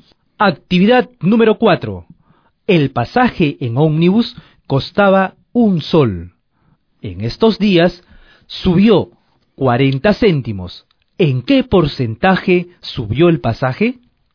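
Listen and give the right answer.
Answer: 40%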